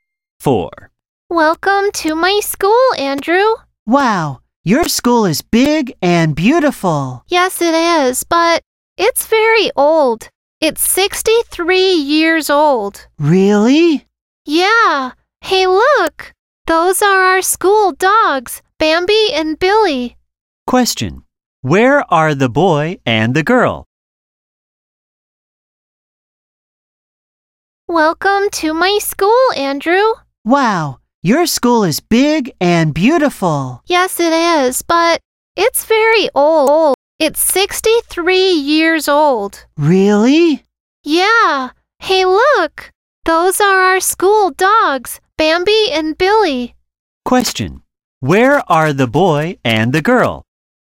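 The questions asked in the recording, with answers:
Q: Where are the boy and the girl?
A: At the girl's school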